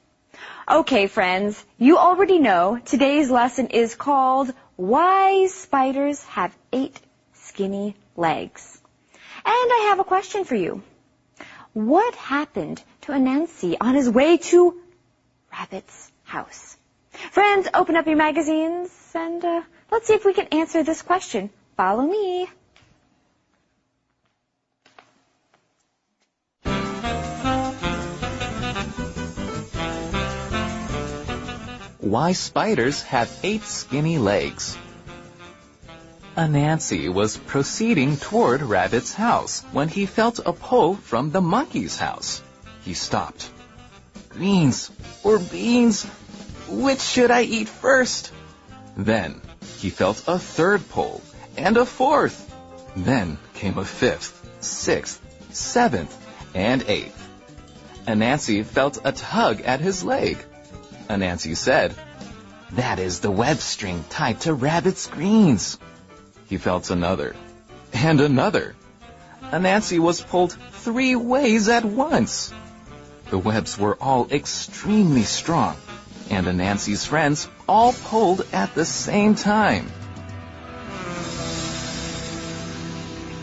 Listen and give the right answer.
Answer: Yes, he felt a pull from monkey's house.